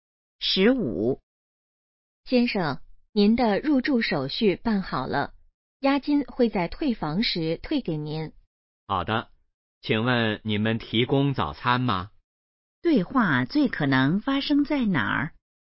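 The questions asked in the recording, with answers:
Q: 对话最可能发生在哪儿?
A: 酒店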